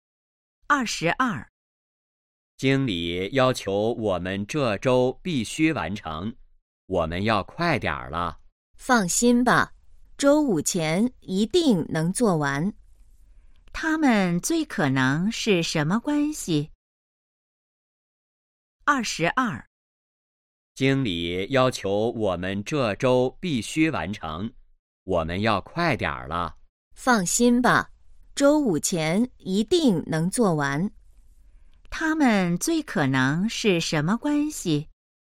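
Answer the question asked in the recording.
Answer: 同事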